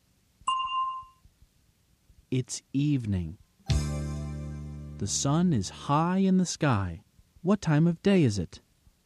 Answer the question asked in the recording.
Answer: It's afternoon.